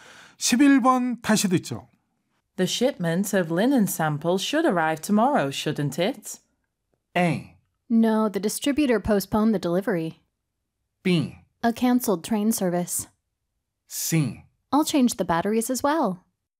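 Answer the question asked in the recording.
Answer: A: No, the distributor postponed the delivery.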